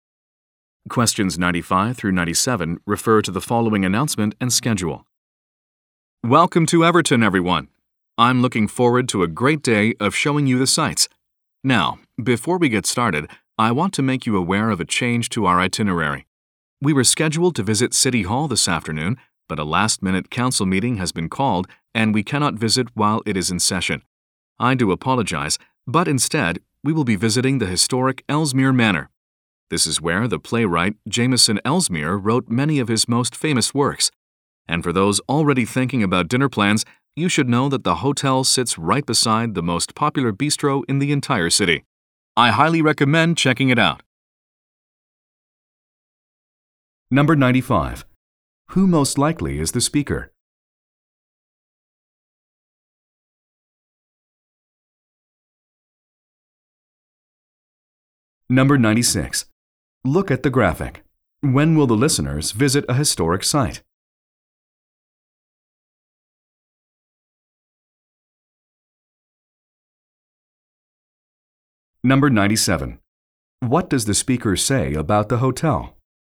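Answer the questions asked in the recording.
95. A tour guide
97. It is right next to the city's most popular bistro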